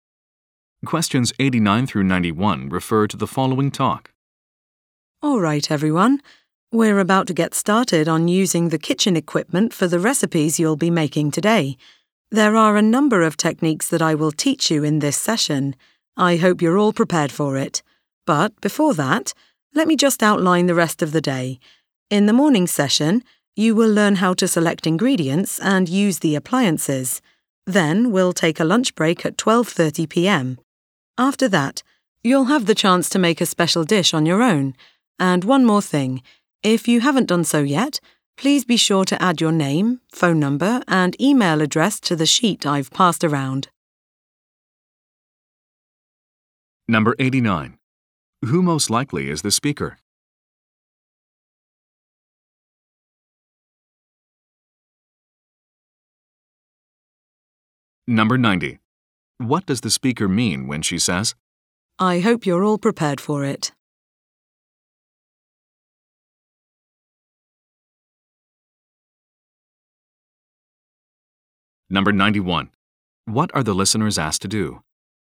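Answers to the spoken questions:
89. A cooking instructor
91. Write their name, phone number, and email address on a sheet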